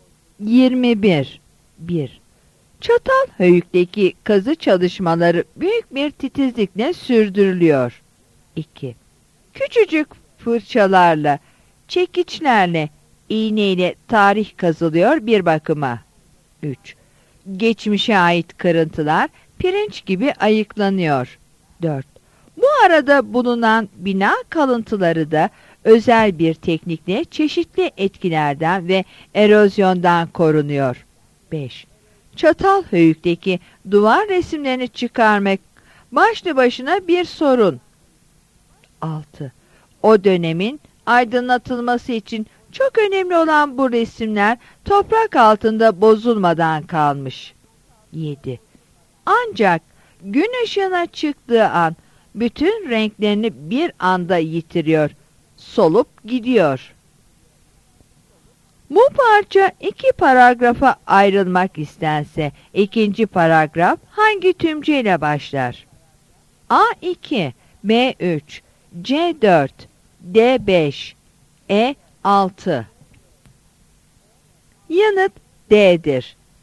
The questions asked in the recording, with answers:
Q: Bu parça iki paragrafa ayrılmak istense ikinci paragraf hangi tümceyle başlar?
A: Yanıt D'dir.